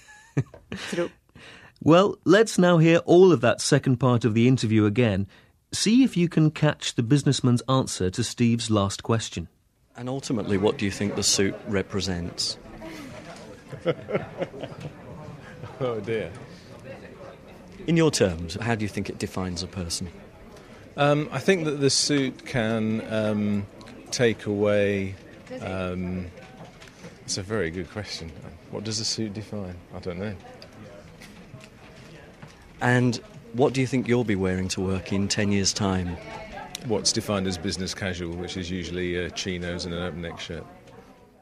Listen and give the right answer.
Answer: Yes, he called this business casual.